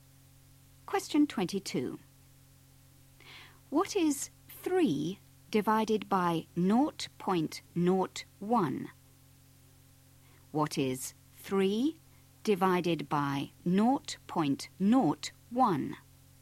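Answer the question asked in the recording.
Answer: 300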